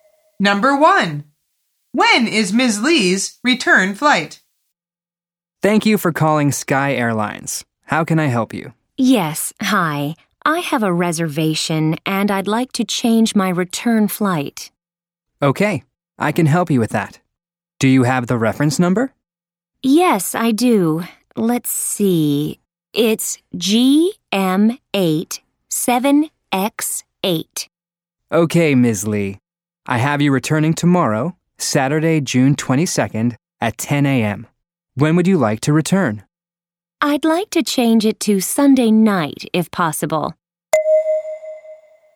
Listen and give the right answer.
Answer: The answer is Saturday.